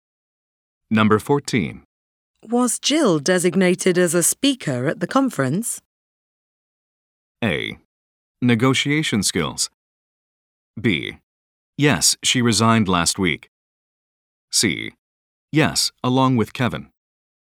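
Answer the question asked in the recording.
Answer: C: Yes, along with Kevin.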